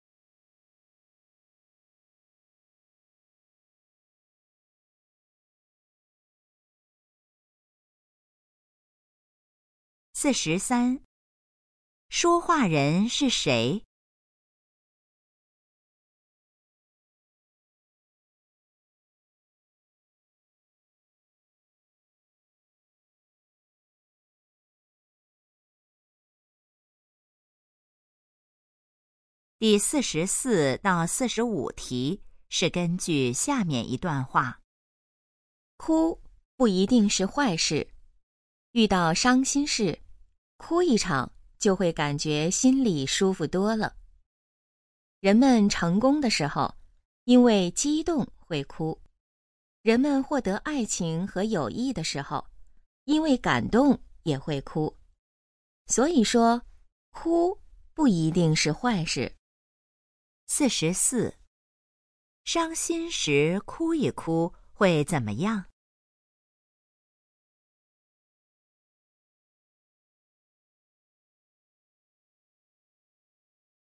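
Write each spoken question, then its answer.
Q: 伤心时哭一哭会怎么样?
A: 心里会舒服多了

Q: 这段话主要想告诉我们什么?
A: 哭不一定是坏事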